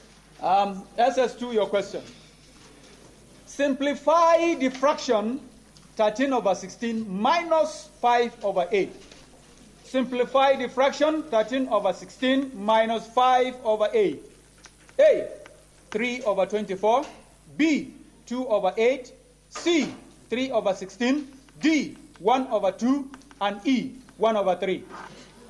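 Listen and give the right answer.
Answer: C: 3 over 16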